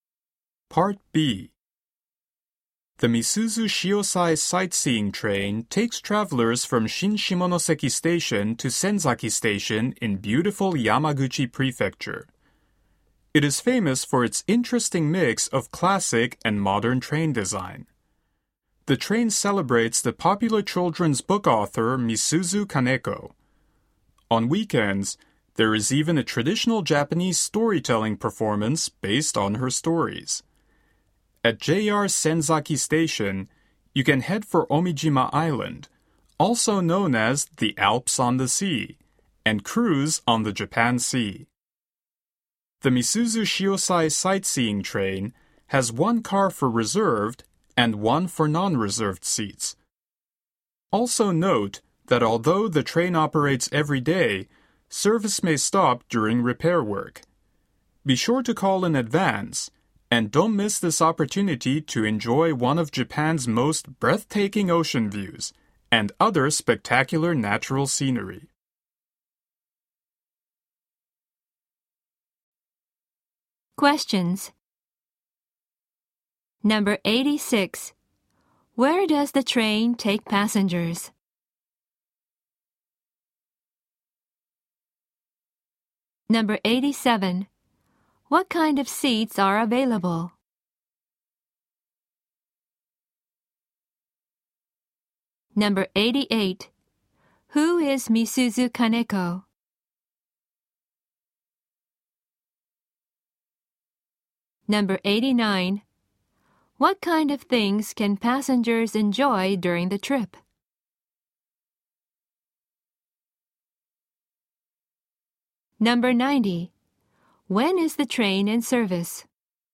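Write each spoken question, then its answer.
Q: Where does the train take passengers?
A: From Shin Shimonoseki Station to Senzaki Station

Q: What kind of seats are available?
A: Reserved and non-reserved seats

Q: Who is Misuzu Kaneko?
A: A popular children's book author

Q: When is the train in service?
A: Every day, except during repair work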